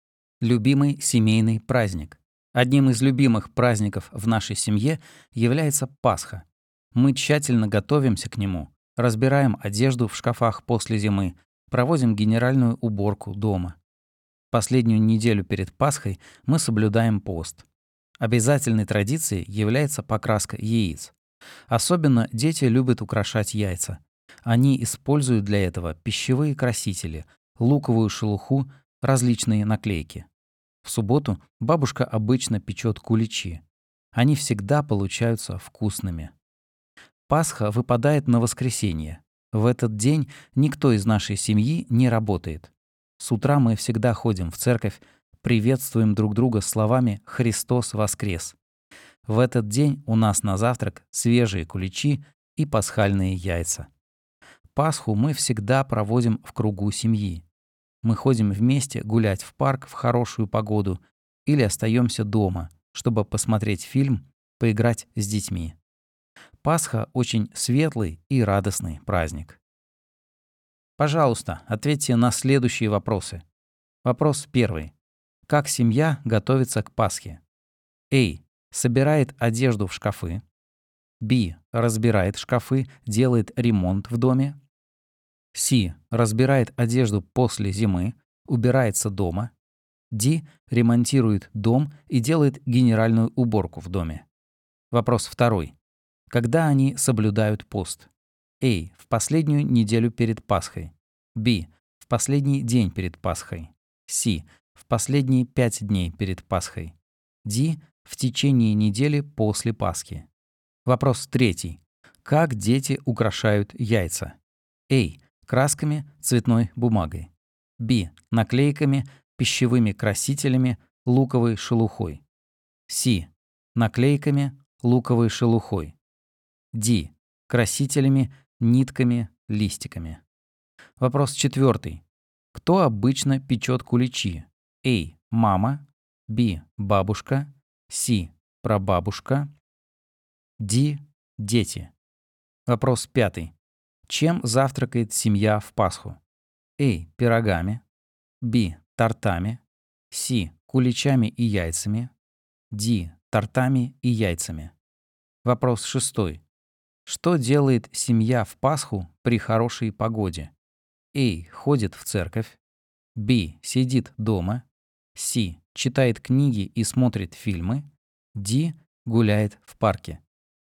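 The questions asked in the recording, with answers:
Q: Как семья готовится к Пасхе?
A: C: Разбирает одежду после зимы, убирается дома.

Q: Когда они соблюдают пост?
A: A: В последнюю неделю перед Пасхой.

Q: Как дети украшают яйца?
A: B: Наклейками, пищевыми красителями, луковой шелухой.

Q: Кто обычно печет куличи?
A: B: Бабушка.

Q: Чем завтракает семья в Пасху?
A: C: Куличами и яйцами.

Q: Что делает семья в Пасху при хорошей погоде?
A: D: Гуляет в парке.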